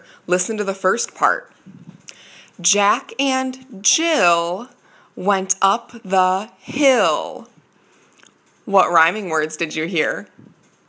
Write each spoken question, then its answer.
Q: What rhyming words did you hear?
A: If you said Jill and Hill, you're right.